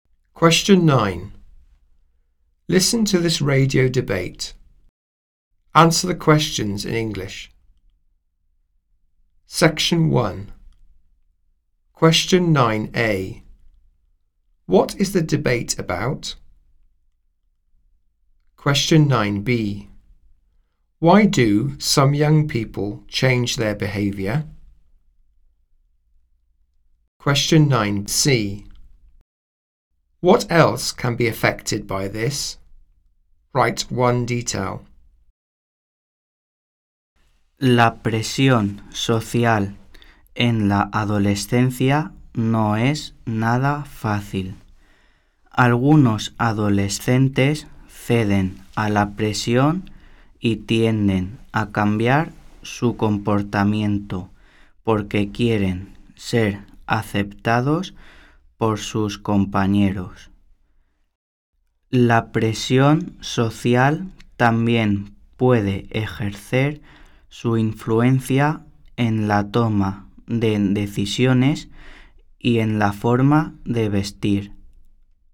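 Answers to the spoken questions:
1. Peer pressure in adolescence
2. To be accepted by their peers
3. Decision-making or the way they dress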